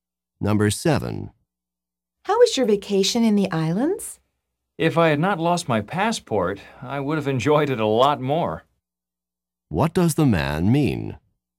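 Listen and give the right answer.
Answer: He lost his passport, so he did not enjoy the vacation much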